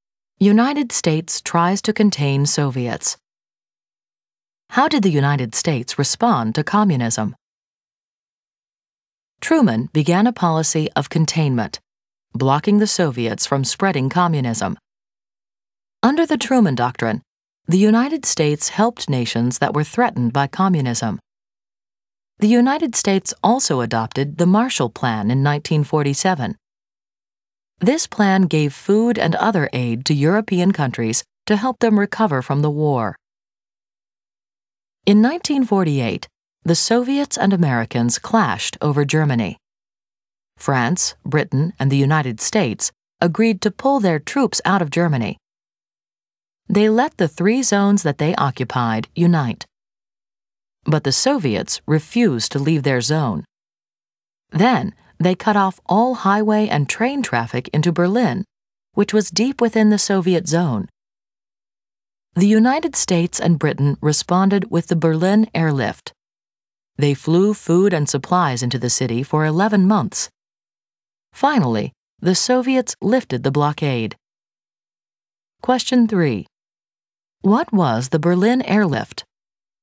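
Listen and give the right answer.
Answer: The U.S. and Britain flew food and supplies into Berlin for 11 months during the Soviet blockade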